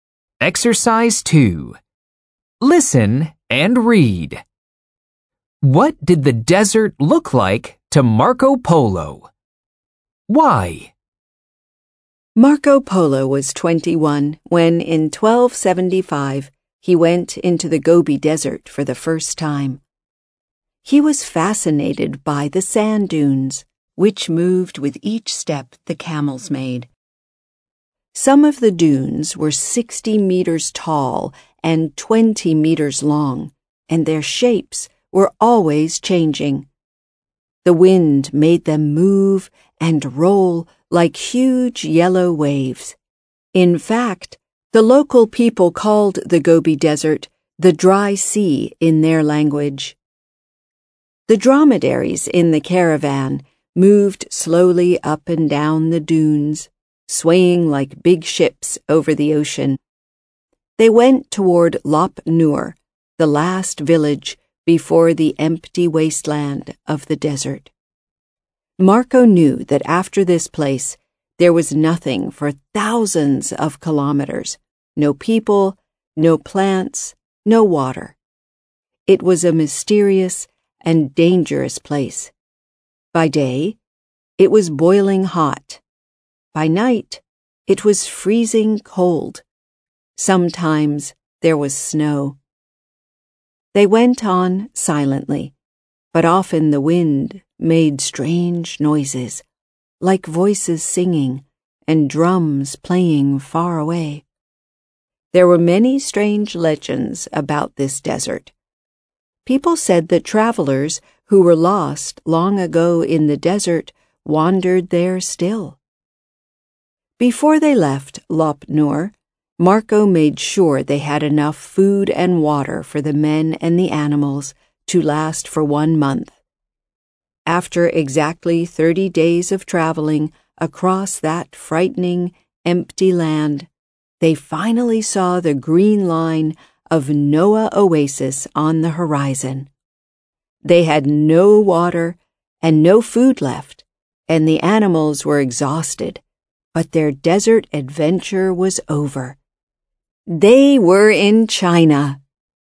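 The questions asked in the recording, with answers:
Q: What did the desert look like to Marco Polo?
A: Like a sea: the dunes moved and rolled like huge yellow waves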